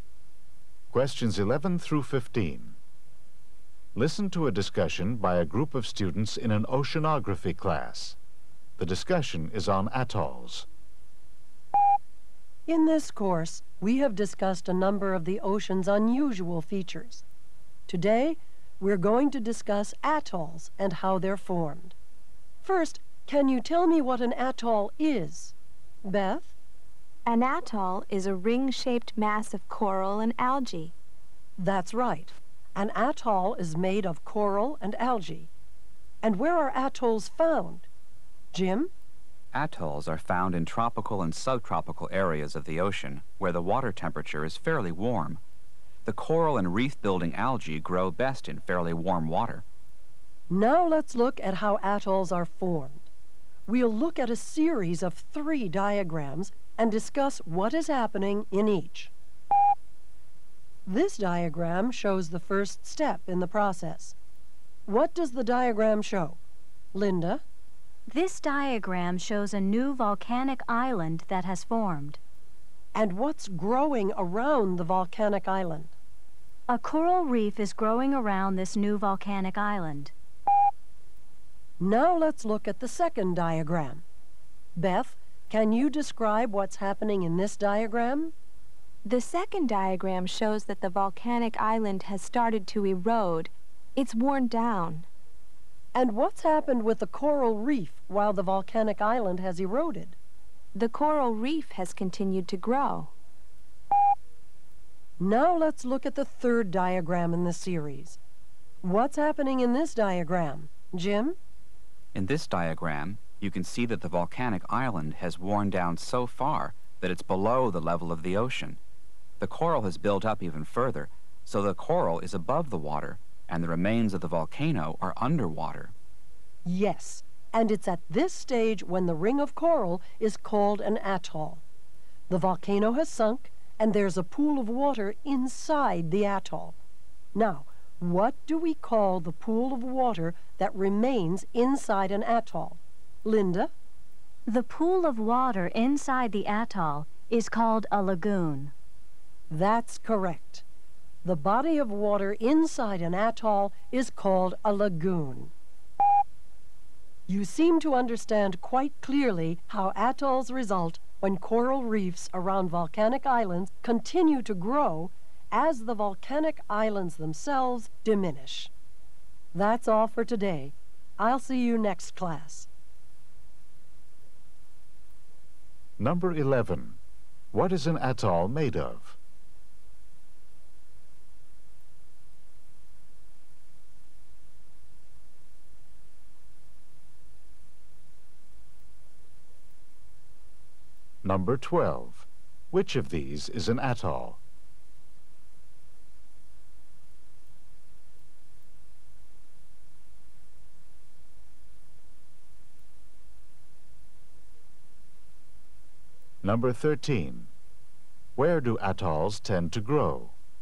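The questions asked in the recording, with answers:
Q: What is an atoll made of?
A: Coral and algae

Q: Where do atolls tend to grow?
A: In warm tropical and subtropical ocean waters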